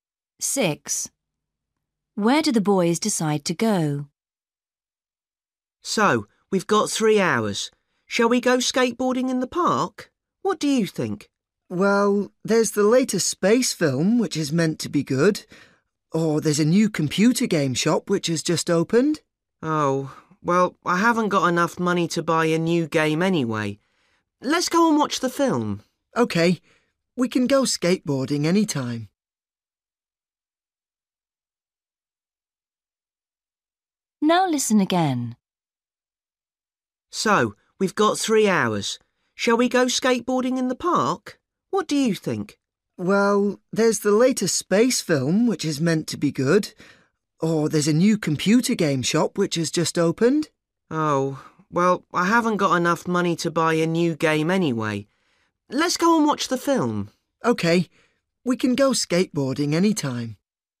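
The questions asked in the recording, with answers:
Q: Where do the boys decide to go?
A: To the cinema to watch the space film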